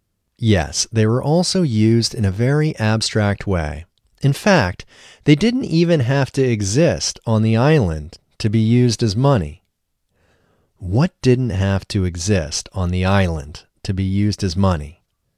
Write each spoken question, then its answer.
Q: What didn't have to exist on the island to be used as money?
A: The stones didn't have to exist on the island to be used as money.